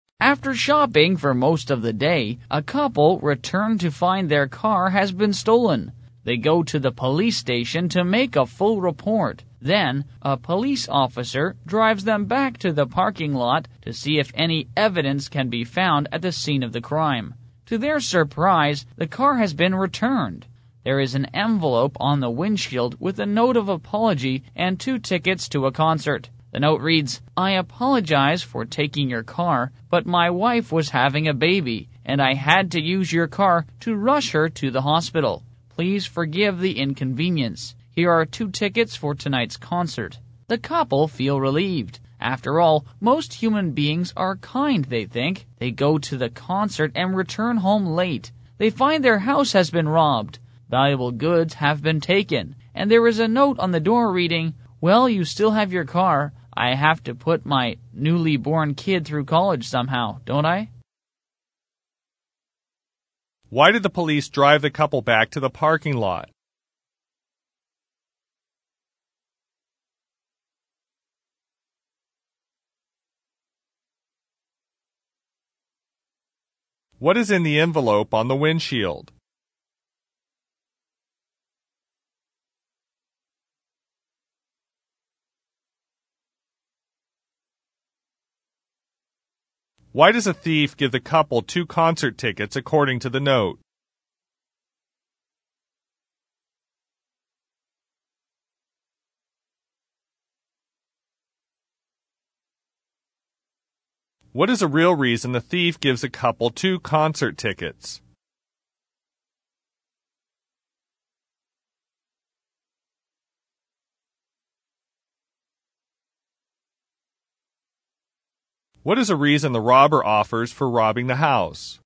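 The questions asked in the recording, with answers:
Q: Why did the police drive the couple back to the parking lot?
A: To see if any evidence could be found at the scene of the crime

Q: What is in the envelope on the windshield?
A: A note of apology and two concert tickets

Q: Why does a thief give the couple two concert tickets according to the note?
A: To apologize for taking their car to rush his wife to the hospital

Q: What is a real reason the thief gives a couple two concert tickets?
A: To get them out of the house so he could rob it

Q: What is a reason the robber offers for robbing the house?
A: To pay for his newborn child's college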